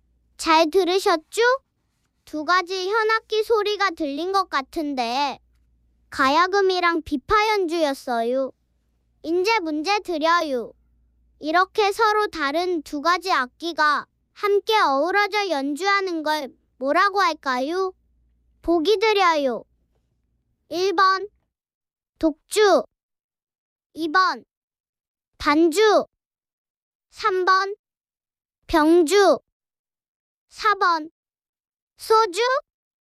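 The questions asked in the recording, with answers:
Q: 이렇게 서로 다른 두 가지 악기가 함께 어우러져 연주하는 걸 뭐라고 할까요?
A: 3: 병주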